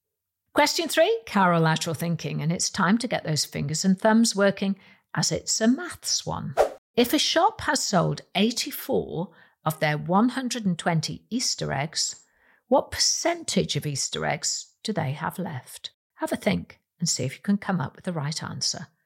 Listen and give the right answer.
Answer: they will have 30% of their eggs left